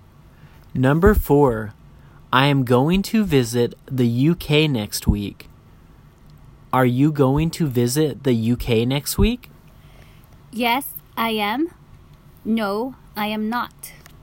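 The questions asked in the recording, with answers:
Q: Are you going to visit the UK next week?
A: Yes, I am.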